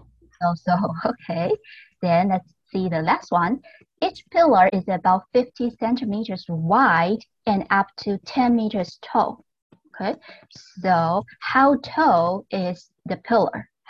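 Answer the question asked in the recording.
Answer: Up to 10 meters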